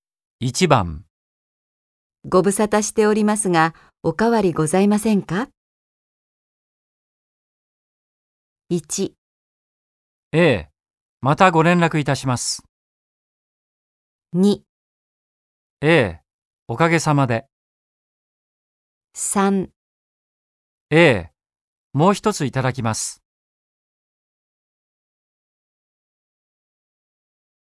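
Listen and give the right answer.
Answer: 2: ええ、おかげさまで。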